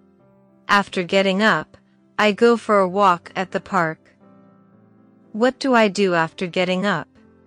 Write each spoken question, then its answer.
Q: What do I do after getting up?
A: I go for a walk.